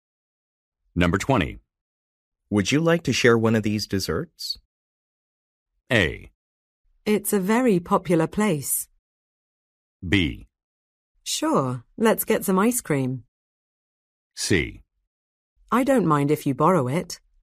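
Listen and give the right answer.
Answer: B: Sure, let's get some ice cream.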